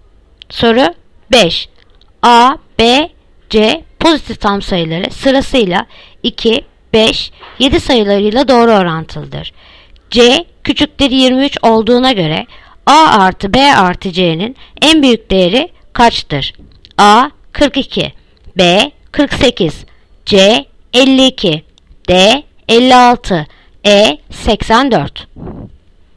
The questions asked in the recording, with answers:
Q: C küçüktür 23 olduğuna göre A artı B artı C'nin en büyük değeri kaçtır?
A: Yanıt Adana 42.